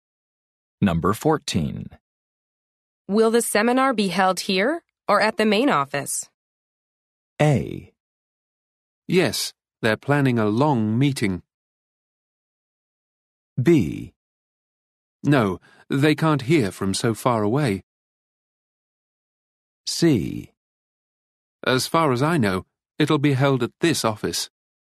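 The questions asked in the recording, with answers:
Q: Will the seminar be held here or at the main office?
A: C: As far as I know, it'll be held at this office.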